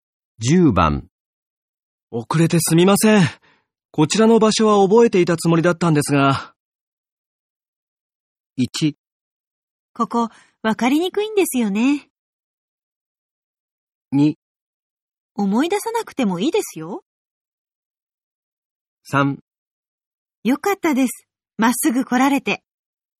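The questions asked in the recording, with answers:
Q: 遅れてすみません。こちらの場所は覚えていたつもりだったんですが。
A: 1: ここ、わかりにくいんですよね。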